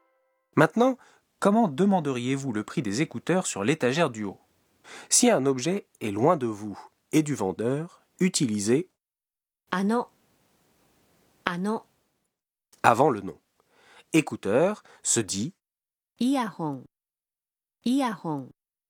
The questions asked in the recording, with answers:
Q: Maintenant, comment demanderiez-vous le prix des écouteurs sur l'étagère du haut?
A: すみません。あのイヤホンはいくらですか?